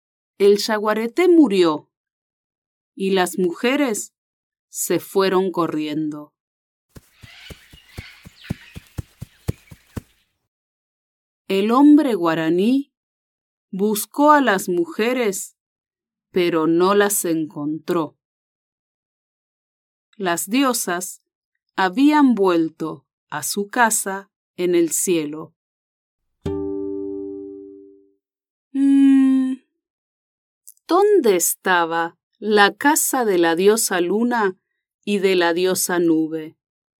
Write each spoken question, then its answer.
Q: ¿dónde estaba la casa de la diosa luna y de la diosa nube?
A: Su casa estaba en el cielo.